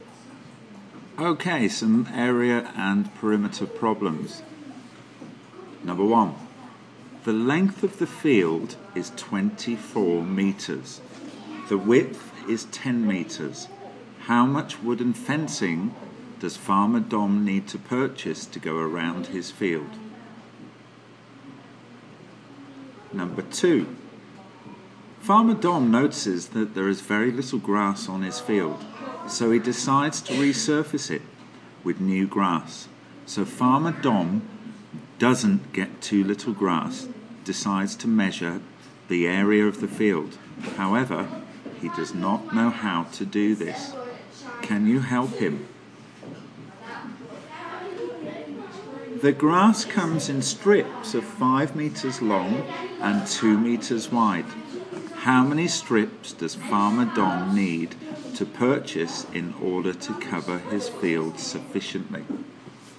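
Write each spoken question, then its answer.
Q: How much wooden fencing does Farmer Dom need to purchase to go around his field?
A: 68 metres

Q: How many strips does Farmer Dom need to purchase in order to cover his field sufficiently?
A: 24 strips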